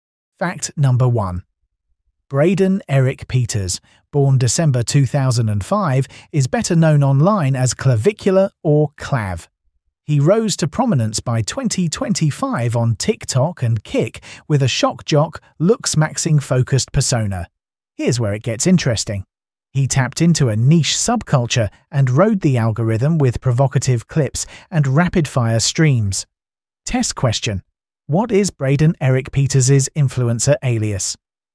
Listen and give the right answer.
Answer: Correct answer. Clavicula.